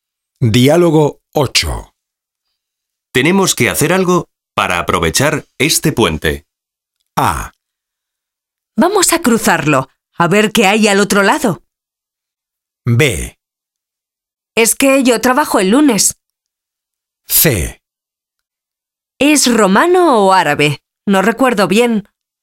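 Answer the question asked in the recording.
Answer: B: Es que yo trabajo el lunes.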